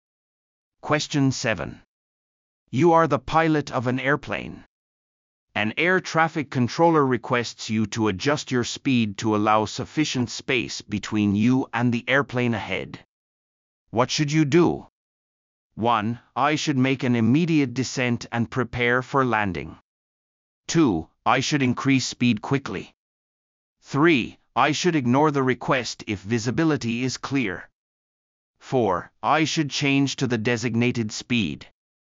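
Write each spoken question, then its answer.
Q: What should you do?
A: 4: I should change to the designated speed.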